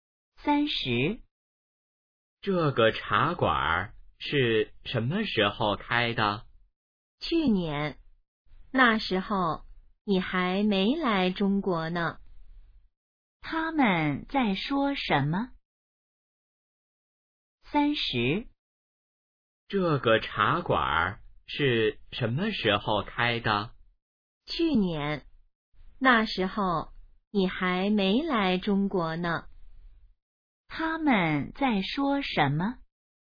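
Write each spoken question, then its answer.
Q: 他们在说什么?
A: 茶馆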